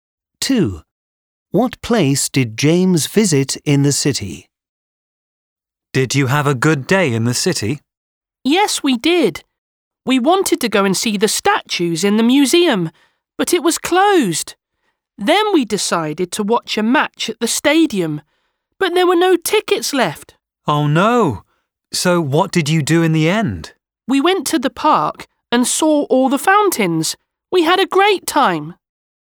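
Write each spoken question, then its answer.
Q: What place did James visit in the city?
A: The park (with the fountains)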